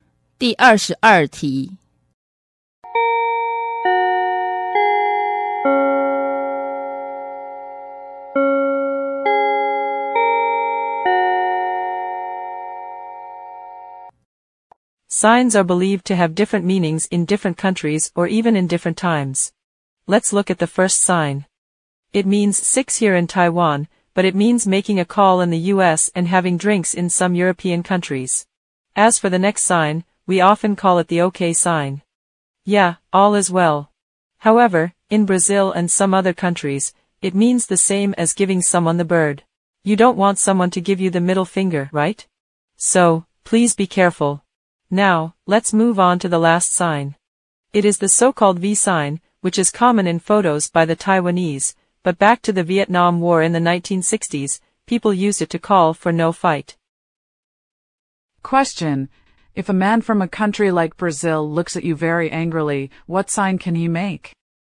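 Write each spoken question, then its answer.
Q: If a man from a country like Brazil looks at you very angrily, what sign can he make?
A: The OK sign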